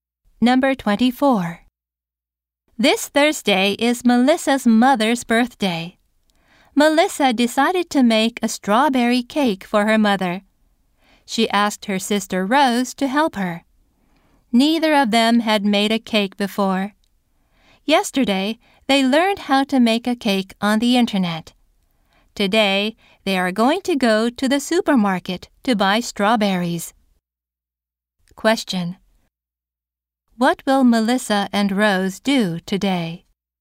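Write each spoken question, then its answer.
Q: Question. What will Melissa and Rose do today?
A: Go to the supermarket to buy strawberries.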